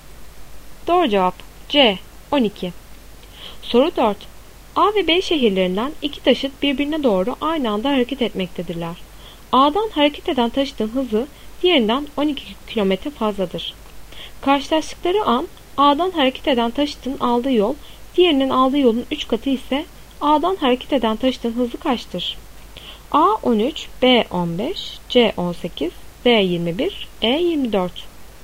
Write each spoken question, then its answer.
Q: Karşılaştıkları an A'dan hareket eden taşıtın aldığı yol, diğerinin aldığı yolun 3 katı ise A'dan hareket eden taşıtın hızı kaçtır?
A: Doğru cevap C 18.